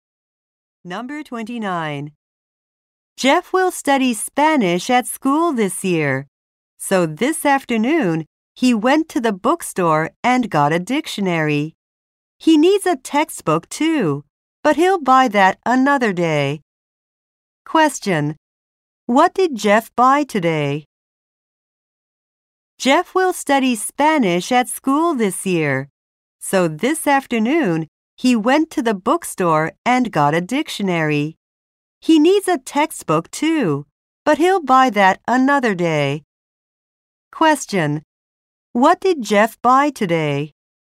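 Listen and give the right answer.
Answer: A dictionary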